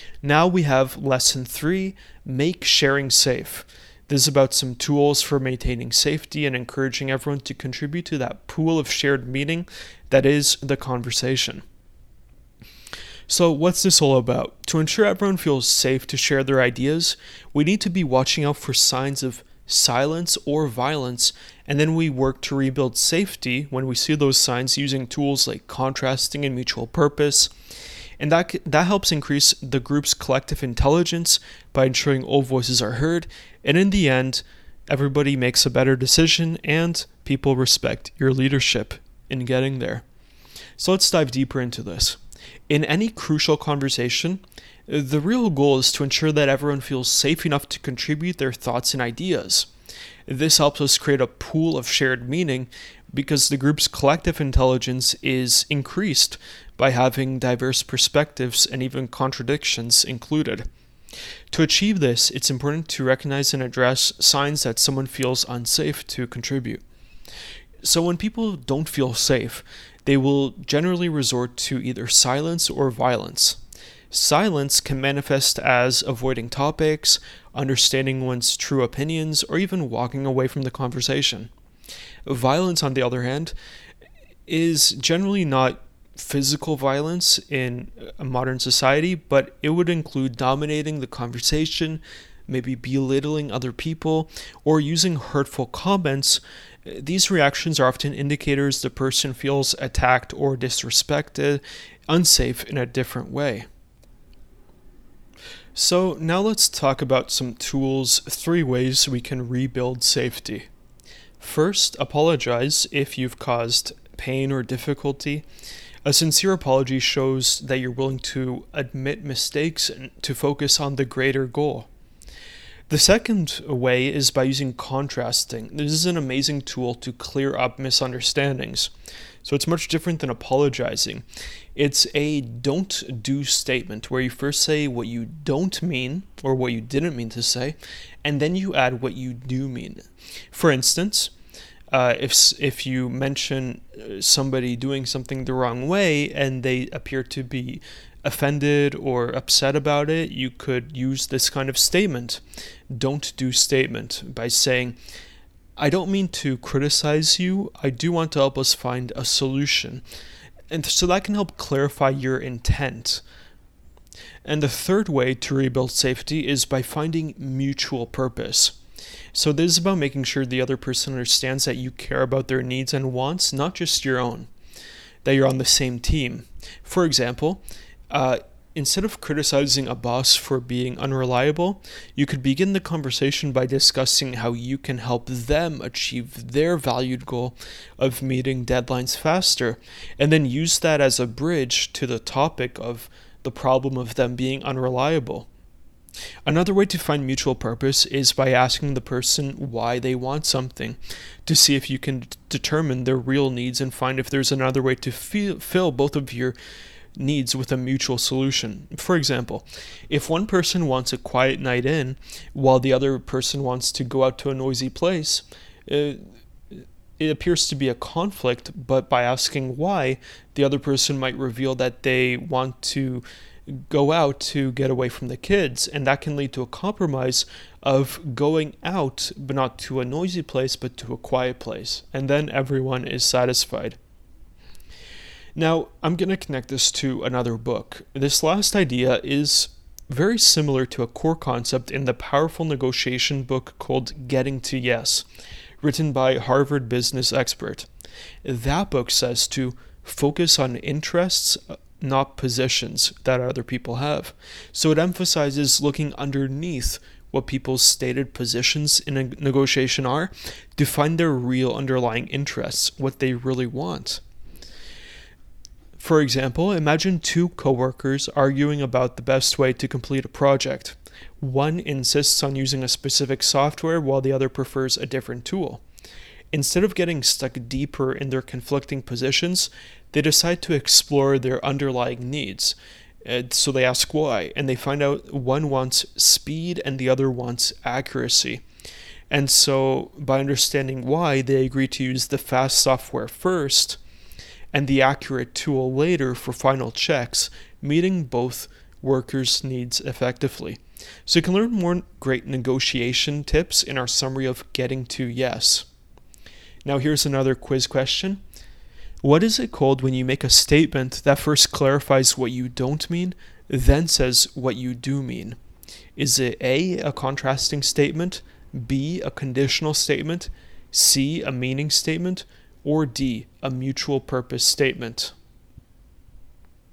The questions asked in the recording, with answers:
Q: What is it called when you make a statement that first clarifies what you don't mean, then says what you do mean?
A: Correct answer is A, a contrasting statement.